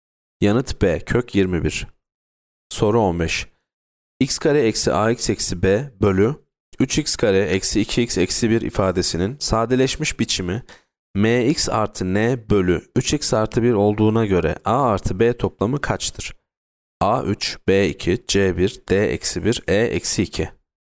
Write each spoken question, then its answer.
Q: X kare eksi AX eksi B bölü 3x kare eksi 2x eksi 1 ifadesinin sadeleşmiş biçimi MX artı N bölü 3x artı 1 olduğuna göre A artı B toplamı kaçtır?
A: Yanıt C 1.